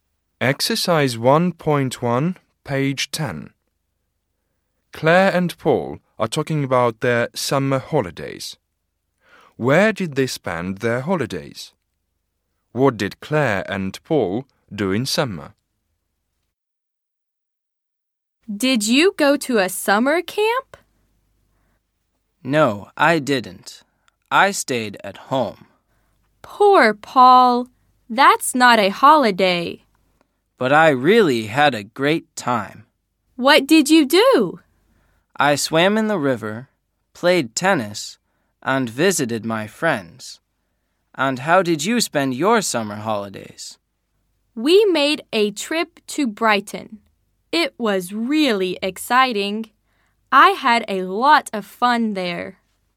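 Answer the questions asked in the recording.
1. Paul stayed at home; Claire went on a trip to Brighton.
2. Paul swam in the river, played tennis and visited his friends; Claire made a trip to Brighton and had a lot of fun.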